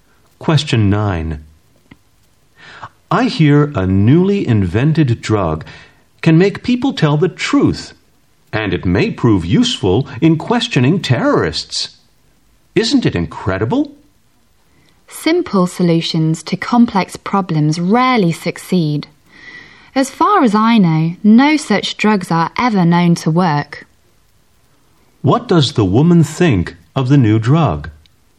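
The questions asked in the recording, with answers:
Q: What does the woman think of the new drug?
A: She doubts it will work.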